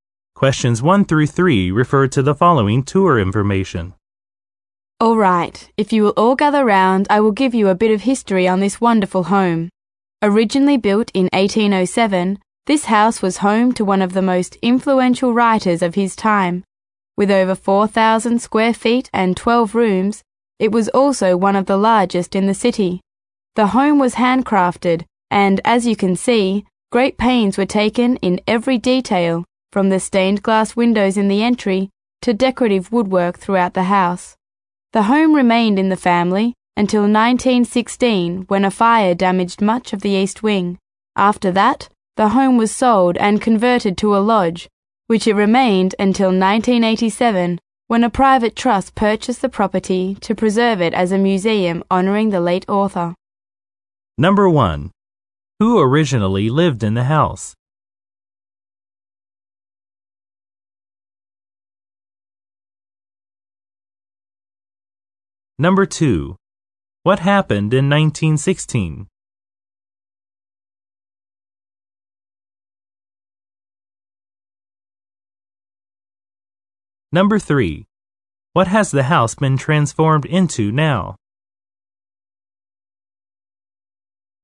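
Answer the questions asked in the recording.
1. An influential writer
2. A fire damaged much of the east wing
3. A museum honoring the late author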